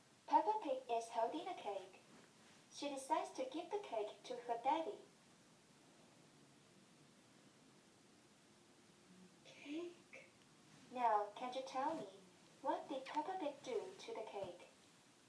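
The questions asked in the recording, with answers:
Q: Can you tell me, what did Peppa Pig do to the cake?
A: She gave the cake to her daddy.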